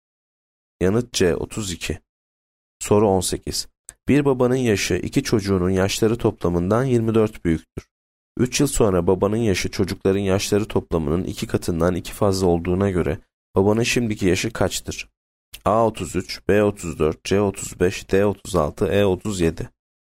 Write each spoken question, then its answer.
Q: 3 yıl sonra babanın yaşı çocukların yaşları toplamının 2 katından 2 fazla olduğuna göre babanın şimdiki yaşı kaçtır?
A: Yanıt E 37.